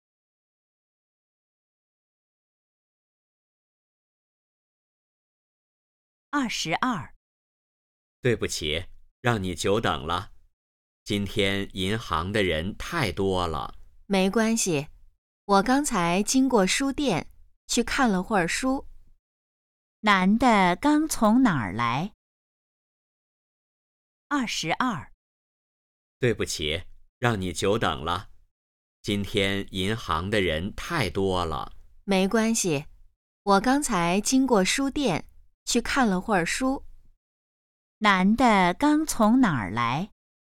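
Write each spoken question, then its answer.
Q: 男的刚从哪儿来?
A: 书店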